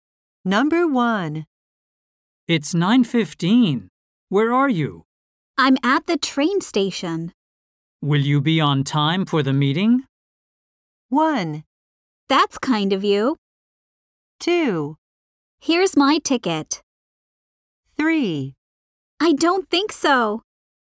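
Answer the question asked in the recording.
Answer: 3: I don't think so.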